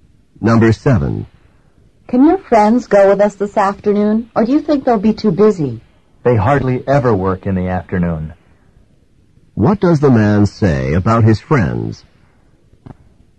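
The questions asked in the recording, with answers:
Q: What does the man say about his friends?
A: They usually aren't busy in the afternoon, so they can probably go.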